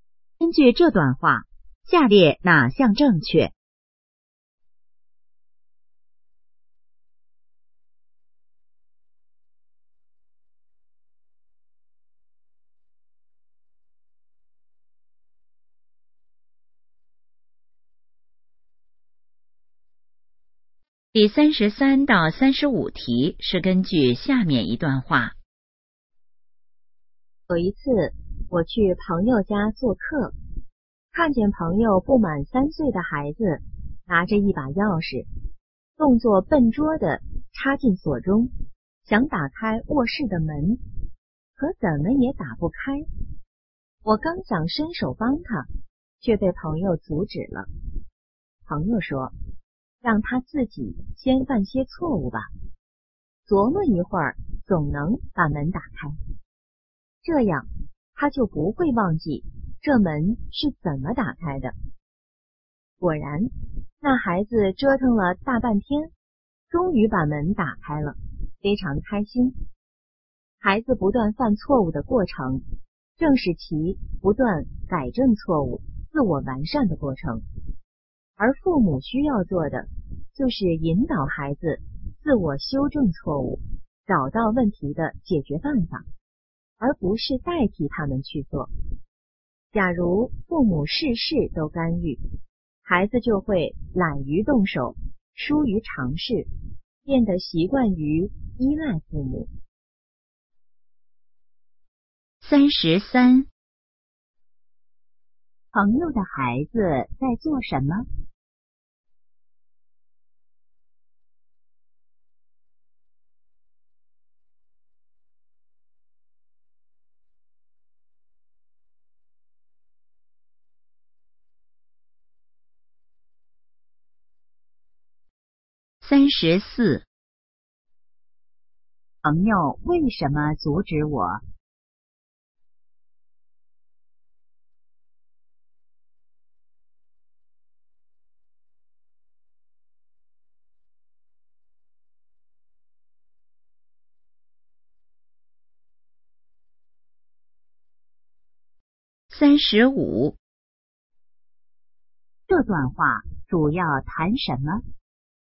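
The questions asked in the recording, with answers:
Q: 朋友的孩子在做什么?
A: 用钥匙开卧室的门

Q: 朋友为什么阻止我?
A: 想让孩子自己犯错、自己琢磨把门打开

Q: 这段话主要谈什么?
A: 父母应让孩子自己改正错误,不要代替他们做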